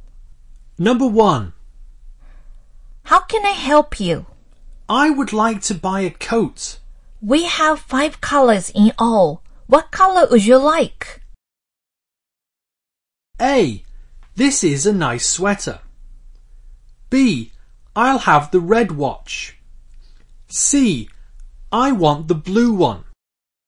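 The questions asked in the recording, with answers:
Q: What color would you like?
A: C: I want the blue one.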